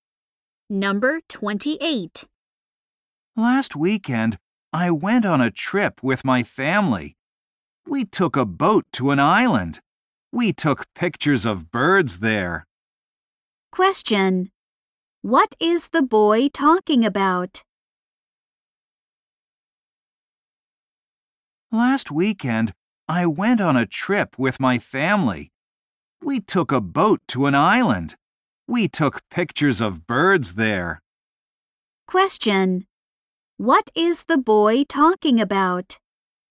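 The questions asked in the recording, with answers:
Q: What is the boy talking about?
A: A family trip to an island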